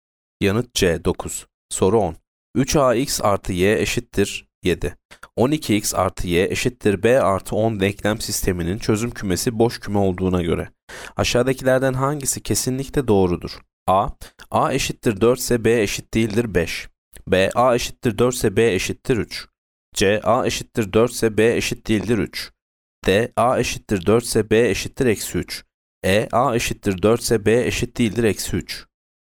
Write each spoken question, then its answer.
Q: 12x artı y eşittir b artı 10 denklem sisteminin çözüm kümesi boş küme olduğuna göre aşağıdakilerden hangisi kesinlikle doğrudur?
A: Yanıt E. A eşittir 4 ise B eşit değildir eksi 3.